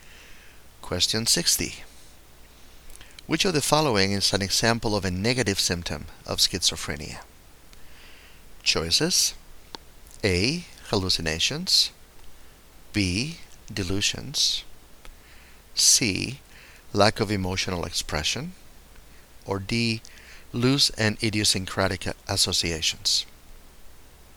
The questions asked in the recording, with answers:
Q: Which of the following is an example of a negative symptom of schizophrenia?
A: And the correct choice here is C, lack of emotional expression.